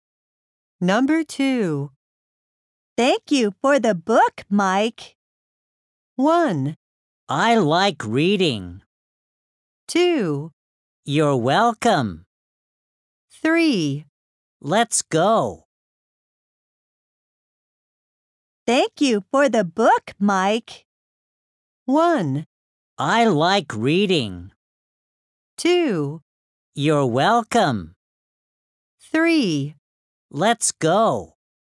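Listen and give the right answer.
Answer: 2: You're welcome.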